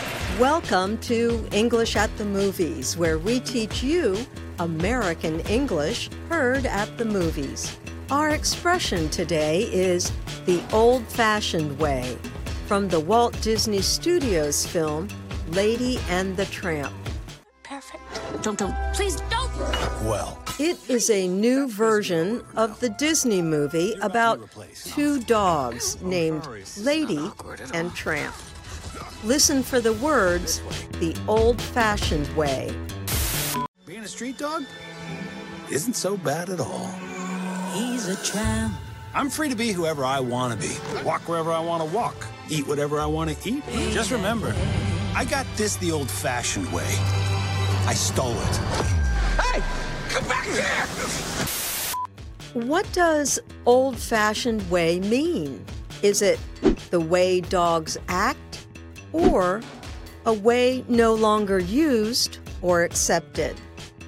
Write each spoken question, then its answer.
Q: What does old-fashioned way mean?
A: The answer is B. Old-fashioned way means a method that is no longer used or accepted.